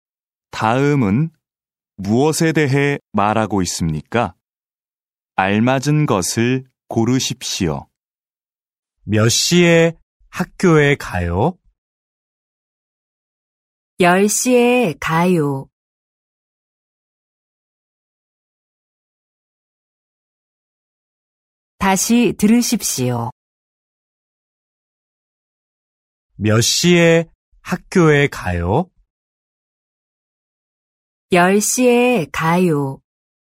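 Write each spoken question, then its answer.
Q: 다음은 무엇에 대해 말하고 있습니까? 알맞은 것을 고르십시오.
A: 시간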